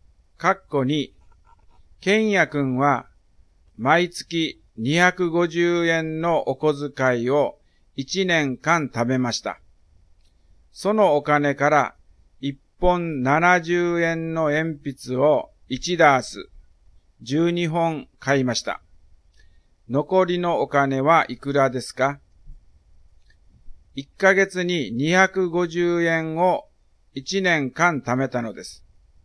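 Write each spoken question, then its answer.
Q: 残りのお金はいくらですか?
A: 2160円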